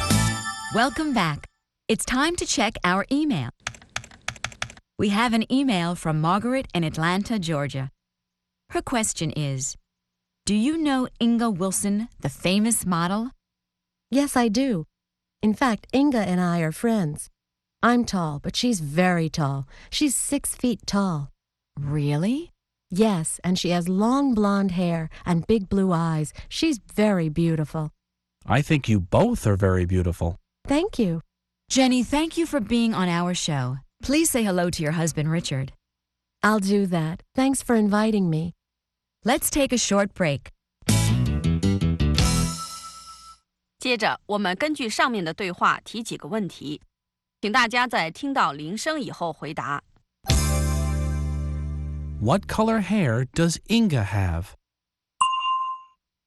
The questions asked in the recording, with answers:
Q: What color hair does Inga have?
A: Inga has blonde hair.